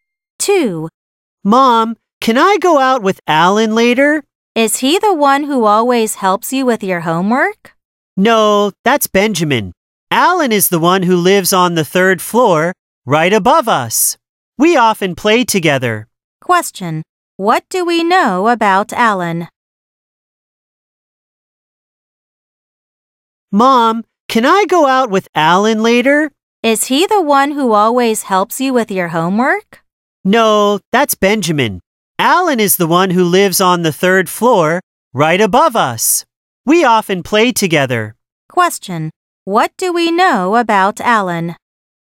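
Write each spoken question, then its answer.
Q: What do we know about Alan?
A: He lives on the third floor, right above them.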